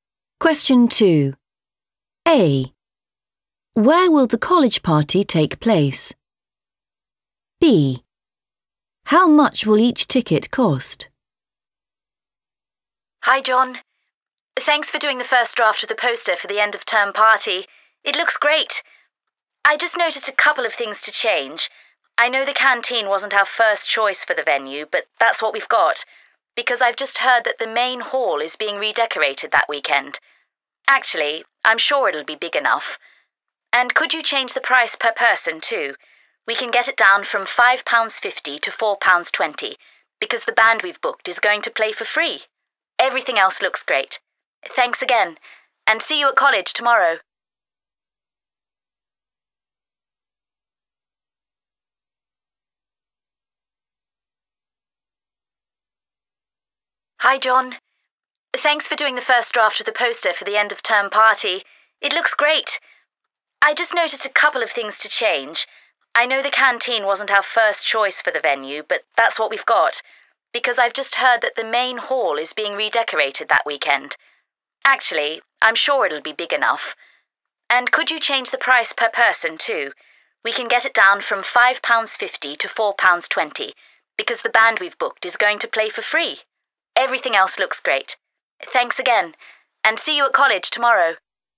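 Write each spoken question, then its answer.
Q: Where will the college party take place?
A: the canteen

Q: How much will each ticket cost?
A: £4.20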